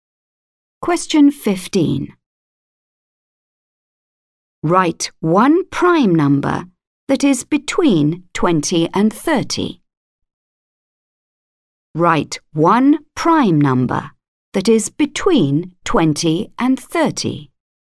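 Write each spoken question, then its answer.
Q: Write one prime number that is between 20 and 30.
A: 23 or 29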